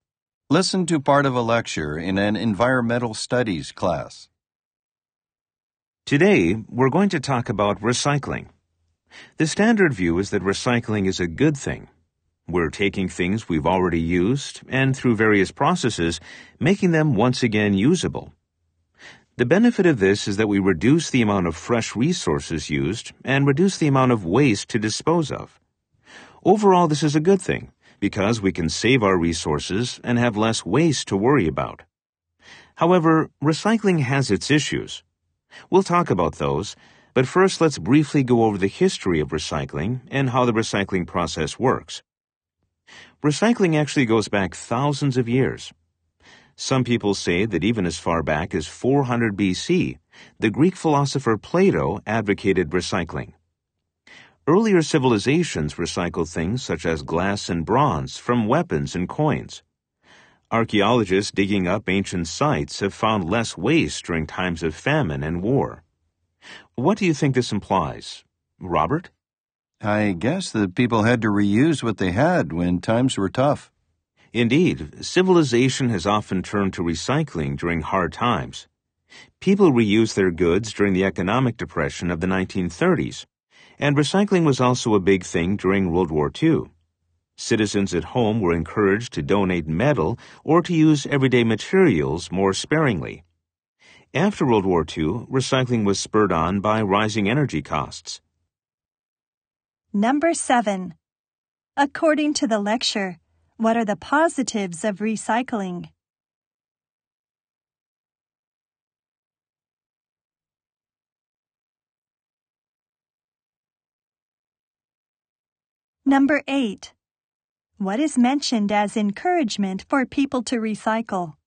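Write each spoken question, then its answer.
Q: According to the lecture, what are the positives of recycling?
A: It cuts the use of fresh resources and reduces the amount of waste to dispose of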